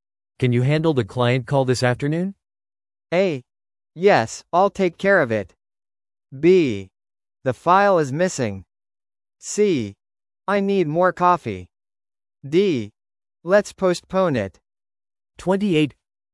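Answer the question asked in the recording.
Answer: A: Yes, I'll take care of it.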